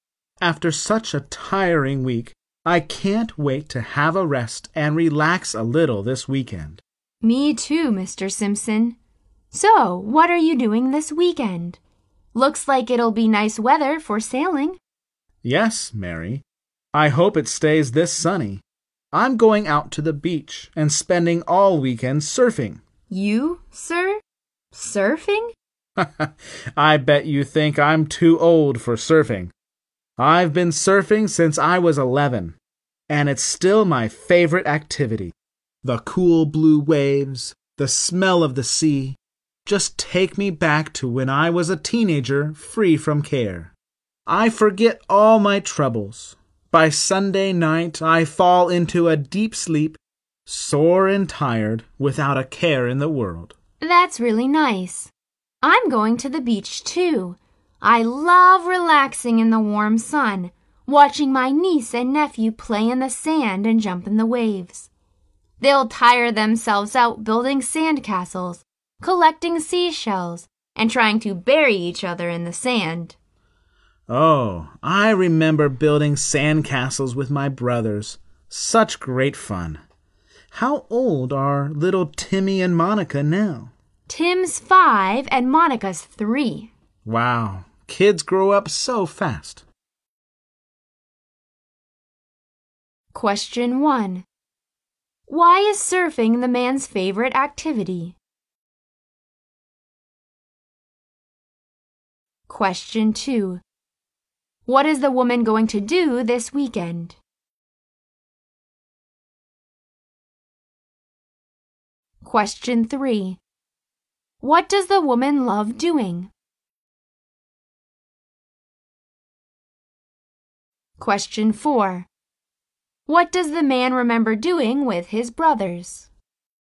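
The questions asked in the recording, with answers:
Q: Why is surfing the man's favorite activity?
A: It takes him back to being a carefree teenager and he forgets his troubles.

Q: What is the woman going to do this weekend?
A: Go to the beach with her niece and nephew.

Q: What does the woman love doing?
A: Relaxing in the warm sun and watching her niece and nephew play.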